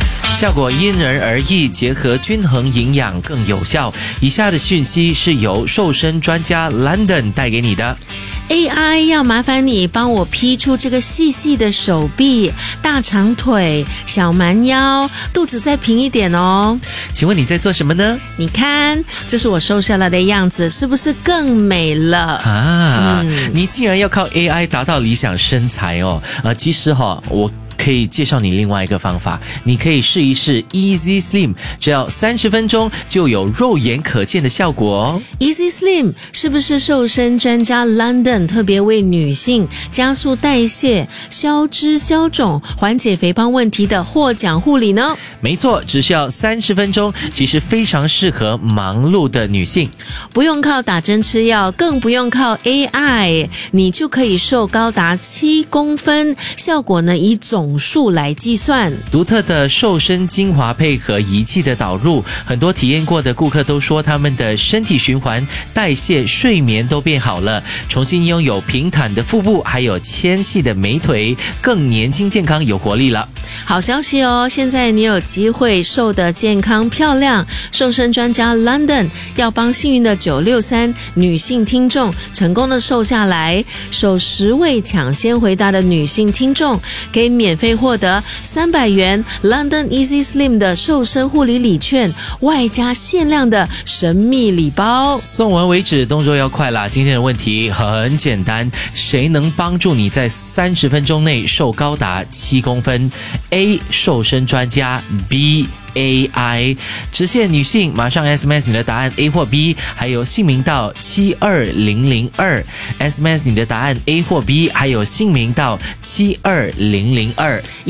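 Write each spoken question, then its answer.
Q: 谁能帮助你在30分钟内瘦高达7公分?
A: A: 瘦身专家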